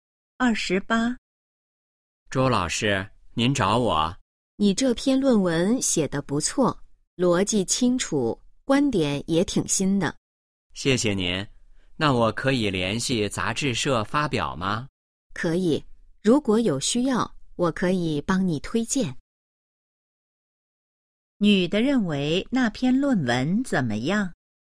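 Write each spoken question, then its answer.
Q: 女的认为那篇论文怎么样?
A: 写得不错,逻辑清楚,观点挺新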